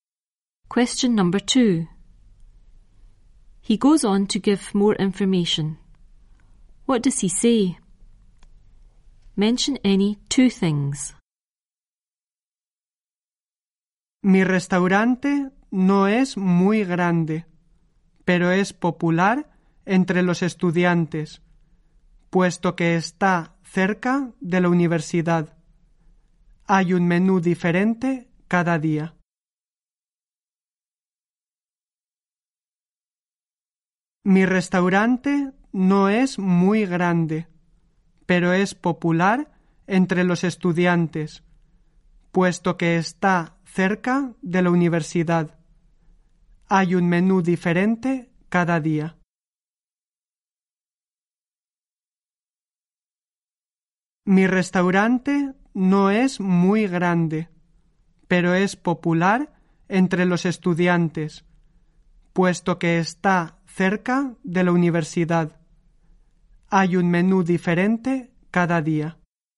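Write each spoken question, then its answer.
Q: What does he say? Mention any two things.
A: Restaurant is not very big; popular with students; near the university; different menu every day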